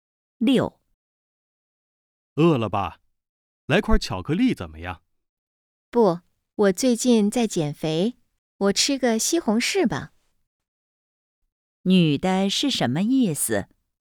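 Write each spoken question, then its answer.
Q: 女的是什么意思?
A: 她在减肥,不吃巧克力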